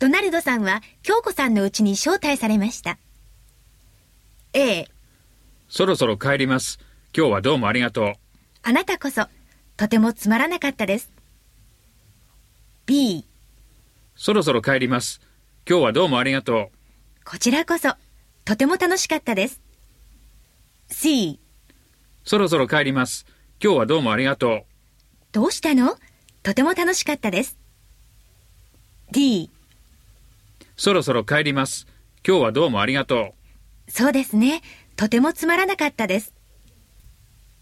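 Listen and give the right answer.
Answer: B: こちらこそ。とても楽しかったです。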